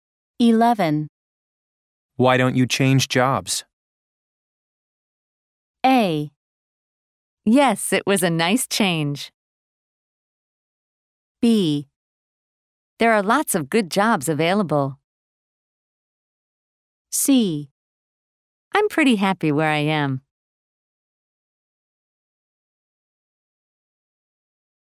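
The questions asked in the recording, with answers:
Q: Why don't you change jobs?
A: C: I'm pretty happy where I am.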